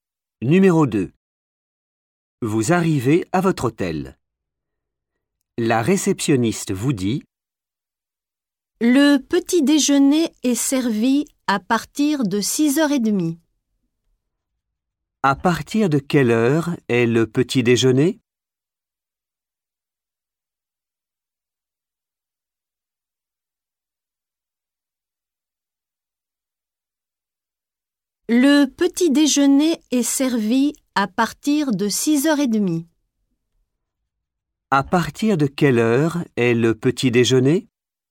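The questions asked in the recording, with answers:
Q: À partir de quelle heure est le petit déjeuner?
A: 6h30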